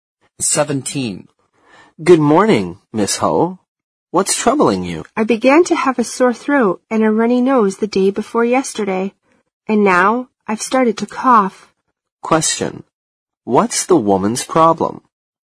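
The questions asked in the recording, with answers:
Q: What's the woman's problem?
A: She has a cold: a sore throat, a runny nose and a cough.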